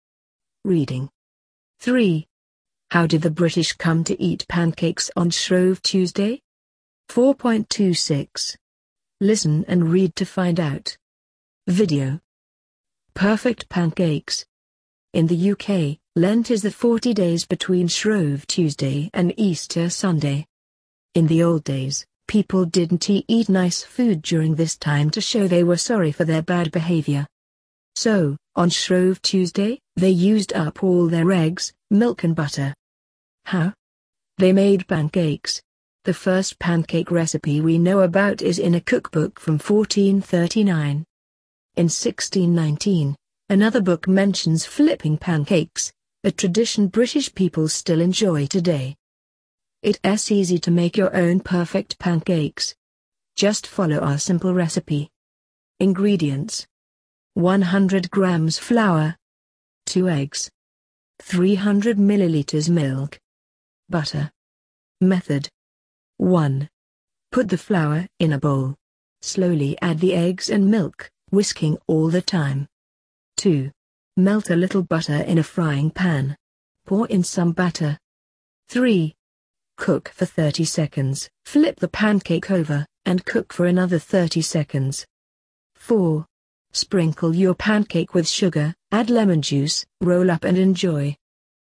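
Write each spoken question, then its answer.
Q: How did the British come to eat pancakes on Shrove Tuesday?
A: Before Lent, when people didn't eat nice food, they used up all their eggs, milk and butter on Shrove Tuesday by making pancakes.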